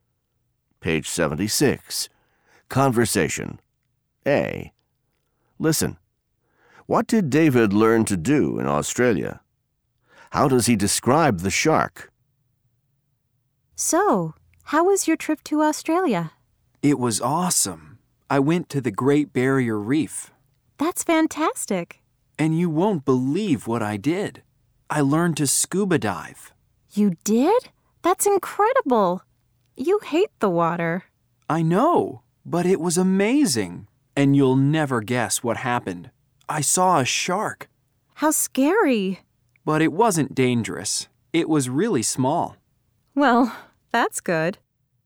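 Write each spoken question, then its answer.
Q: What did David learn to do in Australia?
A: He learned to scuba dive.

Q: How does he describe the shark?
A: It wasn't dangerous; it was really small.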